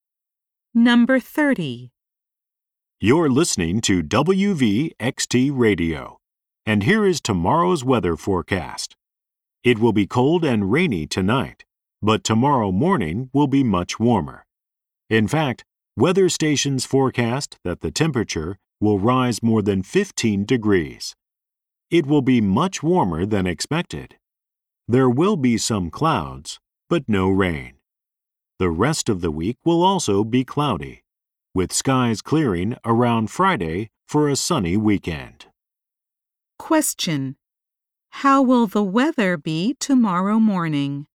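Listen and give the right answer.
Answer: Much warmer, with some clouds but no rain.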